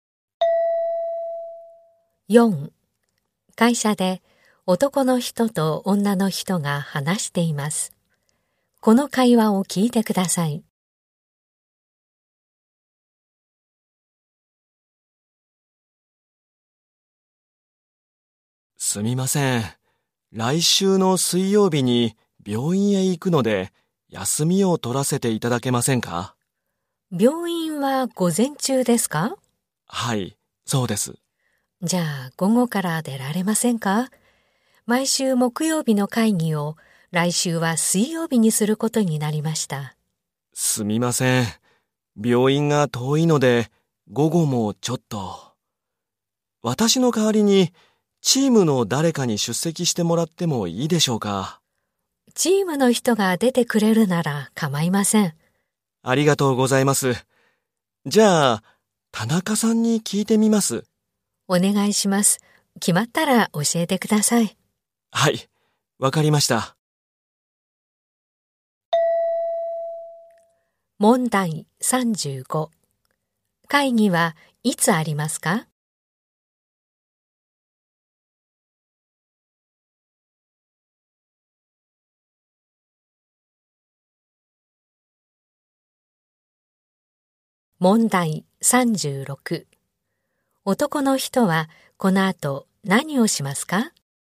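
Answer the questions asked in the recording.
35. 来週の水曜日
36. 田中さんに会議に出てもらえるか聞く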